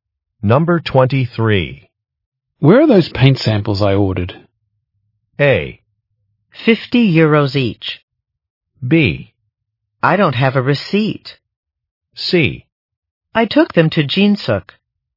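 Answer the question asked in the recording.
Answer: C: I took them to Jinsuk.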